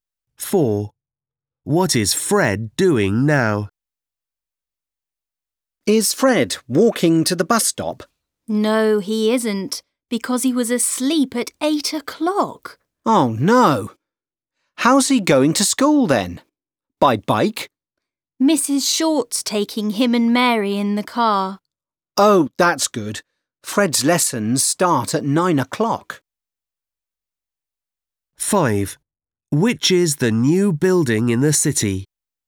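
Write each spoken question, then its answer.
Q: What is Fred doing now?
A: Going to school in Mrs. Short's car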